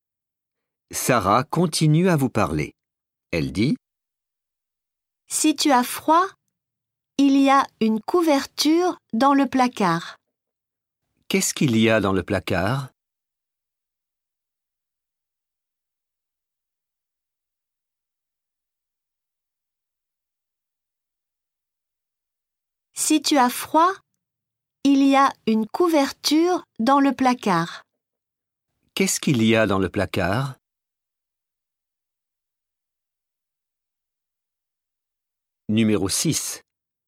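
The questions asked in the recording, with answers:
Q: Qu'est-ce qu'il y a dans le placard?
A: Une couverture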